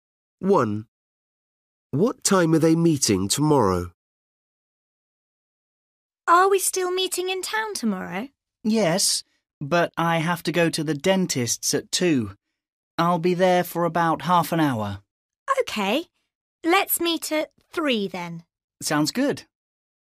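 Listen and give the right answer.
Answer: At 3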